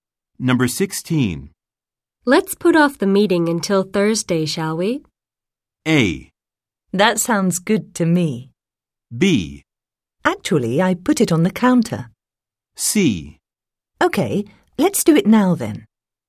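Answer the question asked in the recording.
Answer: A: That sounds good to me.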